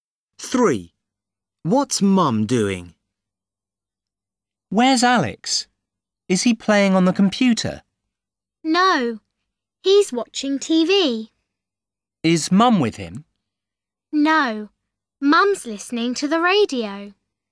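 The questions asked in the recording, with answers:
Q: What's Mum doing?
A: listening to the radio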